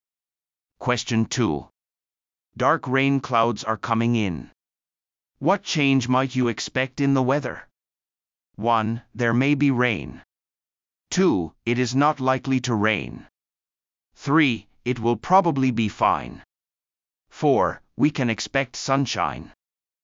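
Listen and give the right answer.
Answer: 1: There may be rain.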